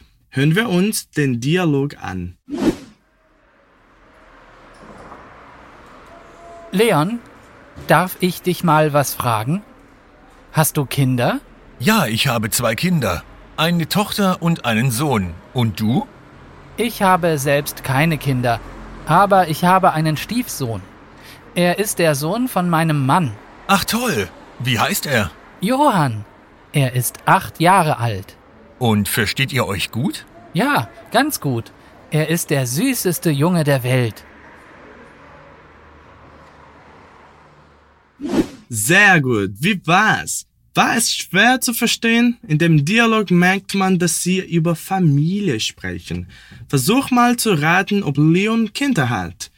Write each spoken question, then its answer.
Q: Versuch mal zu raten, ob Leon Kinder hat.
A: Er hat ja Kinder. Er hat eine Tochter und einen Sohn.